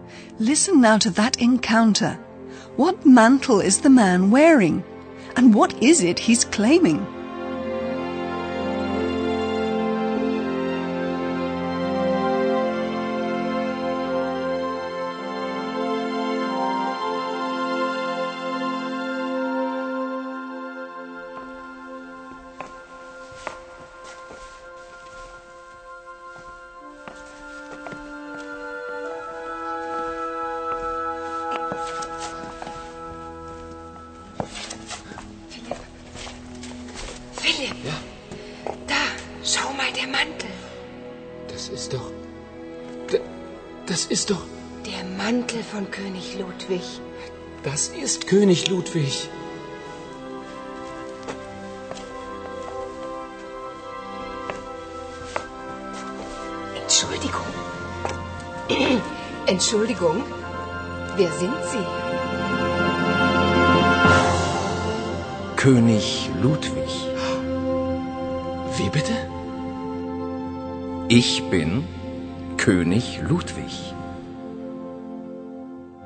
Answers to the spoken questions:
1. Philip and Paula are stunned to see the man wearing the mantle of King Ludwig.
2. Imagine the two reporters' astonishment when they hear the man claim to be King Ludwig.